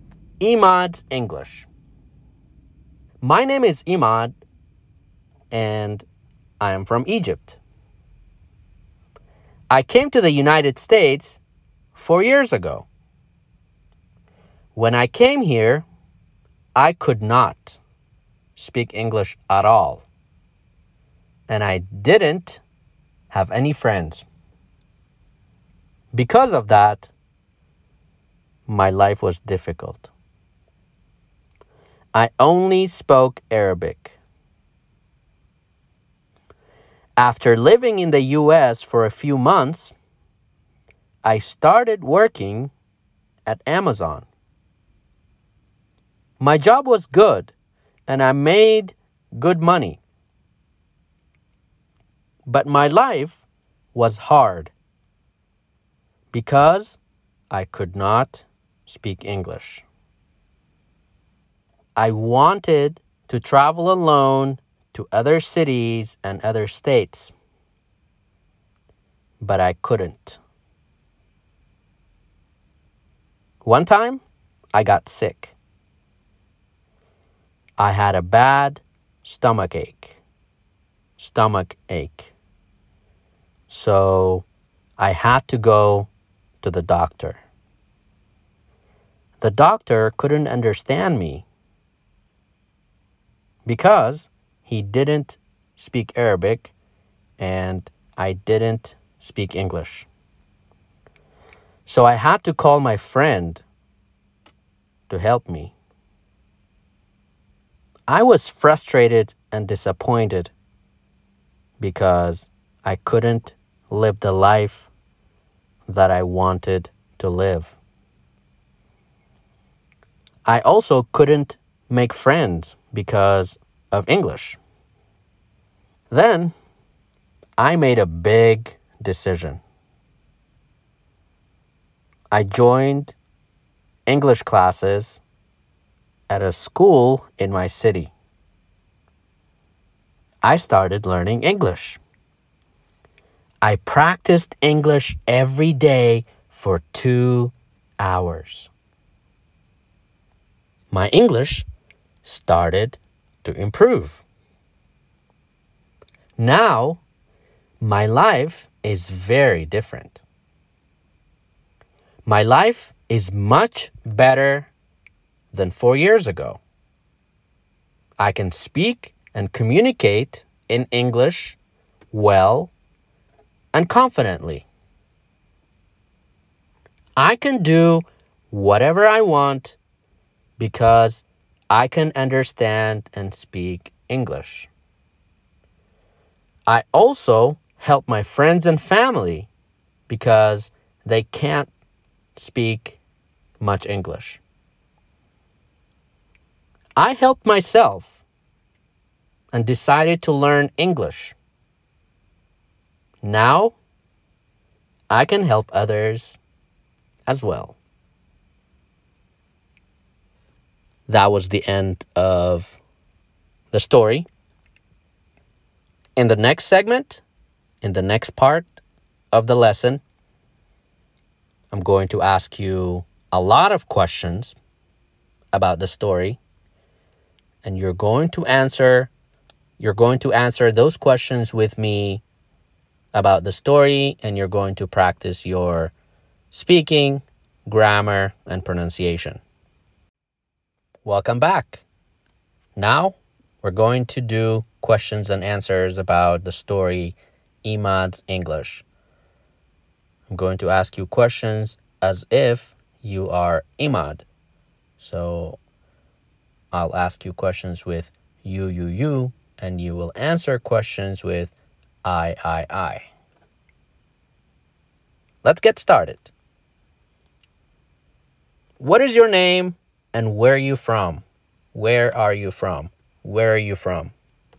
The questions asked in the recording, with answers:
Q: What is your name and where are you from?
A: My name is Emad and I am from Egypt.